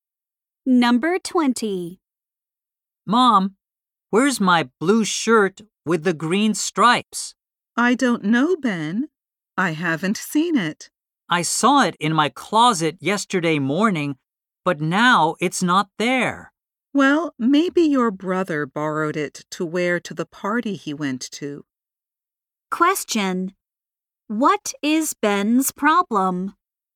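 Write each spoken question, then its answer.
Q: What is Ben's problem?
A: He cannot find his blue shirt.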